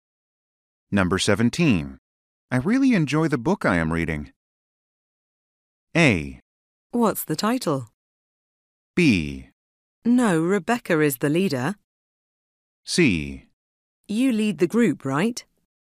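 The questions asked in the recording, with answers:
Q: I really enjoy the book I am reading.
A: A: What's the title?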